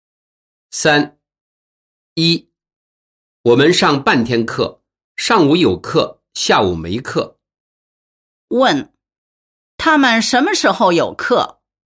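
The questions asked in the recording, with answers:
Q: 他们什么时候有课?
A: 上午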